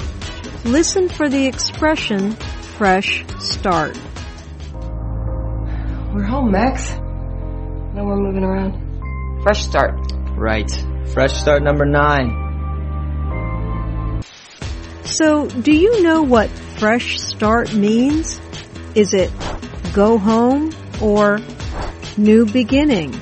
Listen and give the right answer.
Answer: Fresh start means a new beginning.